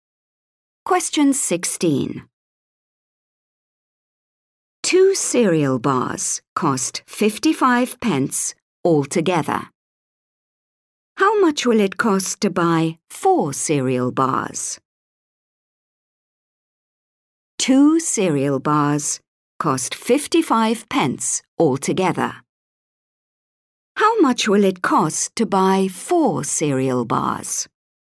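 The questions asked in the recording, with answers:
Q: How much will it cost to buy four cereal bars?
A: 110 pence (£1.10)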